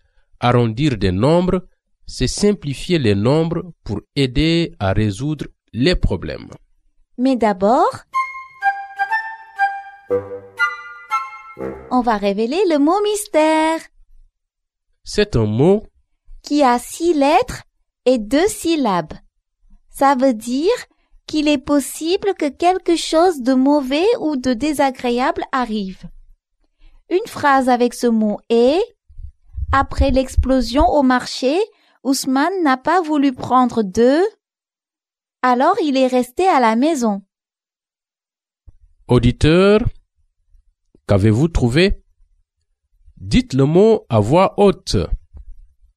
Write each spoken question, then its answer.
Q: Auditeur, qu'avez-vous trouvé?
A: Le mot mystère est « risque ».